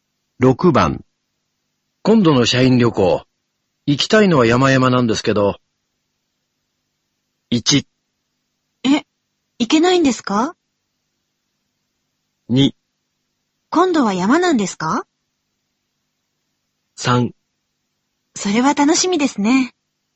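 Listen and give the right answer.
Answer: 1: え、行けないんですか?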